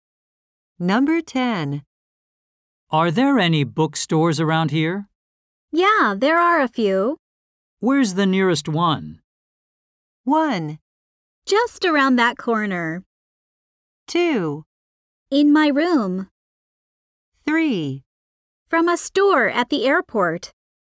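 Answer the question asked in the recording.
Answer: 1: Just around that corner.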